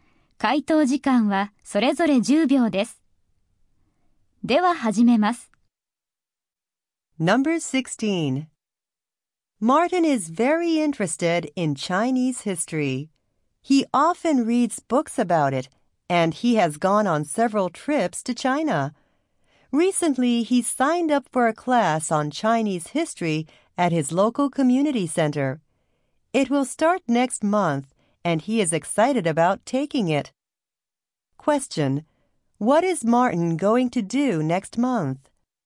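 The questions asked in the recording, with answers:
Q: What is Martin going to do next month?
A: Start a Chinese history class at the community center.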